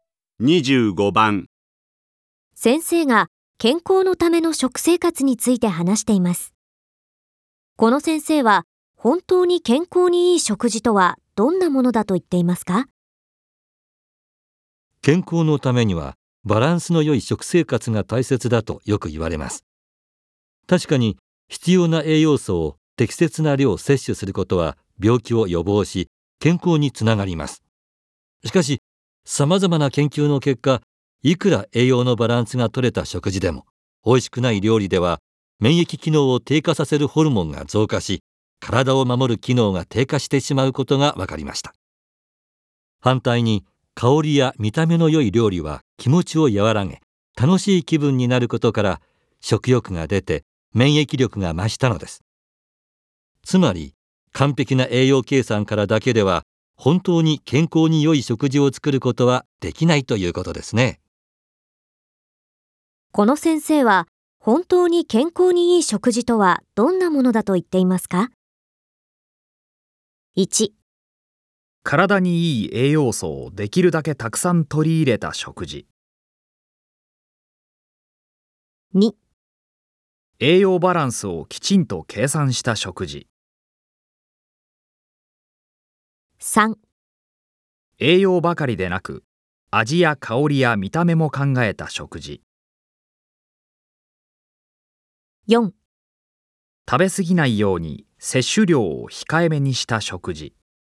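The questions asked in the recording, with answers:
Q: この先生は本当に健康に良い食事とはどんなものだと言っていますか?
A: 3: 栄養ばかりでなく、味や香りや見た目も考えた食事。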